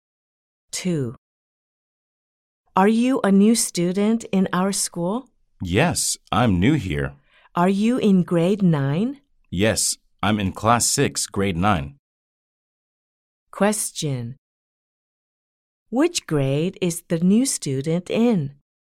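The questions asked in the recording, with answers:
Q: Which grade is the new student in?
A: Grade 9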